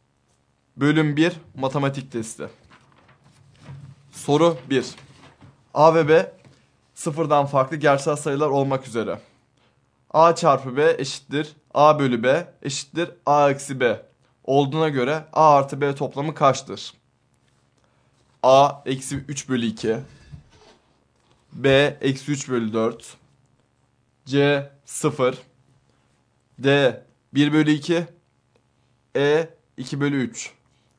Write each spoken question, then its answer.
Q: A çarpı B eşittir A bölü B eşittir A eksi B olduğuna göre A artı B toplamı kaçtır?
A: Doğru yanıt A şıkkı.